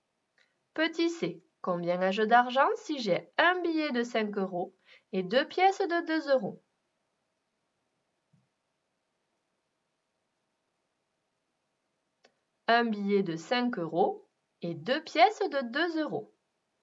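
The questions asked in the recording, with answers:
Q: combien ai-je d'argent si j'ai un billet de 5 euros et deux pièces de 2 euros?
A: 9 euros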